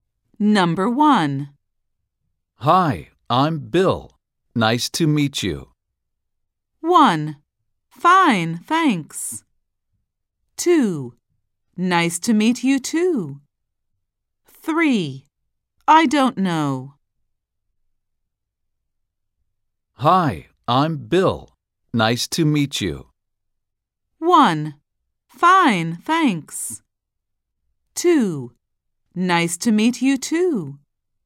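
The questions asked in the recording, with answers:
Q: Hi, I'm Bill. Nice to meet you.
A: 2: Nice to meet you too.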